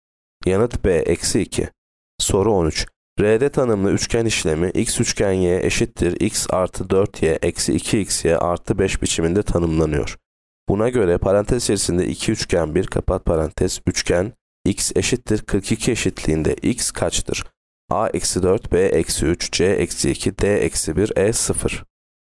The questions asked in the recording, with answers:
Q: Buna göre parantez içerisinde 2 üçgen 1 kapat parantez üçgen x eşittir 42 eşitliğinde x kaçtır?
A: Yanıt B eksi 3.